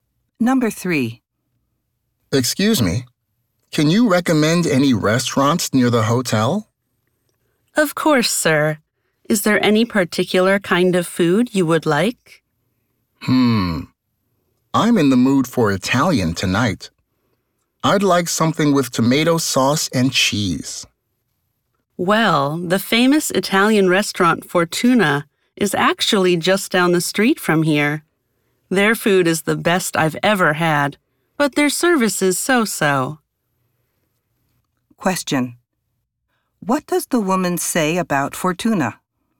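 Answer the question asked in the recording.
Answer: Its food is excellent, but its service is only so-so.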